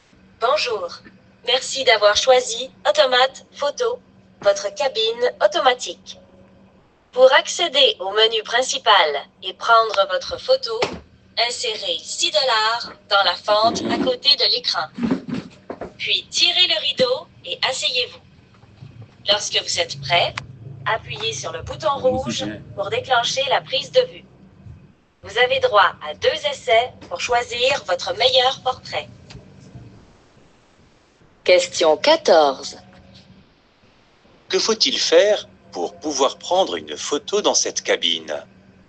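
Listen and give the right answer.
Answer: Insérer 6 $ dans la fente à côté de l'écran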